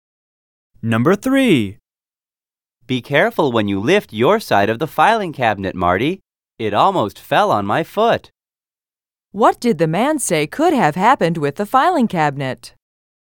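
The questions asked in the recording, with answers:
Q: What did the man say could have happened with the filing cabinet?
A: It could have fallen on his foot.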